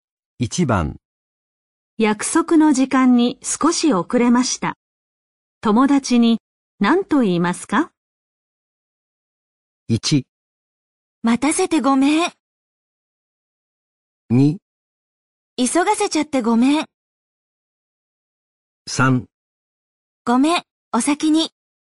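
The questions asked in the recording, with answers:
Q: 約束の時間に少し遅れました。友達に何と言いますか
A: 1: 待たせてごめん。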